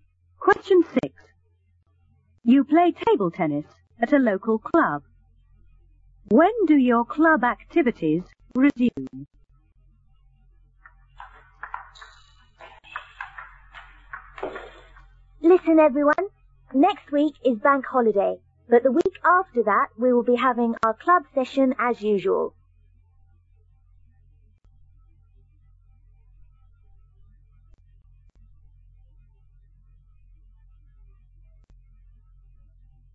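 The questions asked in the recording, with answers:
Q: When do your club activities resume?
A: The week after next week (in two weeks)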